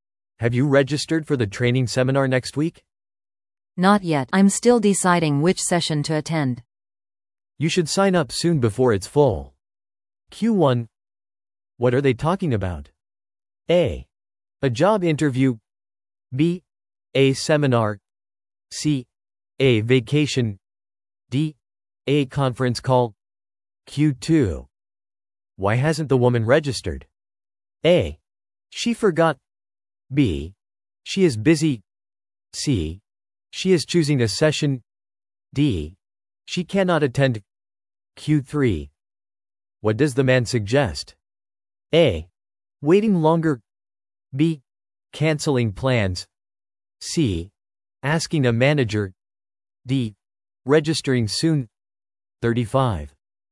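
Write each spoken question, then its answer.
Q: What are they talking about?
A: B: A seminar.

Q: Why hasn't the woman registered?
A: C: She is choosing a session.

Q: What does the man suggest?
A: D: Registering soon.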